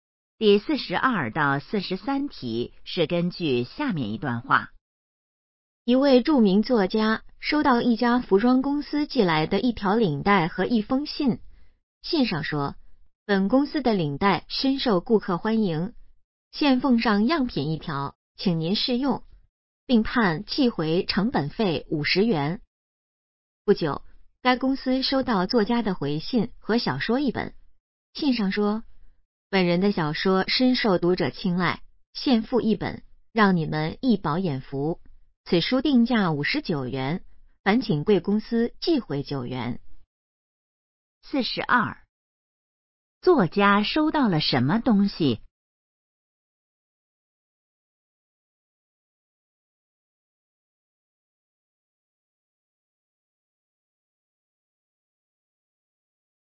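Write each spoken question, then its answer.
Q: 作家收到了什么东西?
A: 一条领带和一封信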